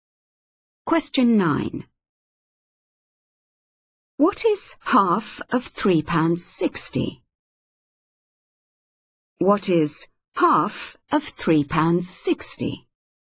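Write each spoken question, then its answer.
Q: What is half of £3.60?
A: £1.80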